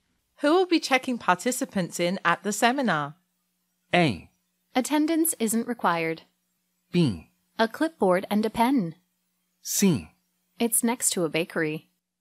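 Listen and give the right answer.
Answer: A: Attendance isn't required.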